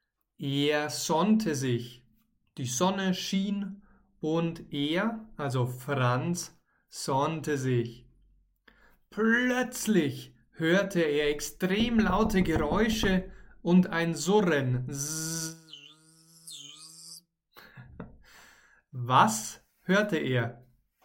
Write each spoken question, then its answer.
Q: Was hörte er?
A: Extrem laute Geräusche und ein Surren.